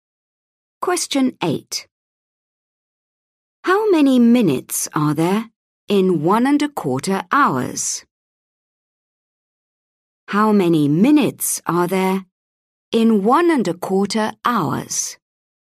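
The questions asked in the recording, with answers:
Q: How many minutes are there in 1.25 hours?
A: 75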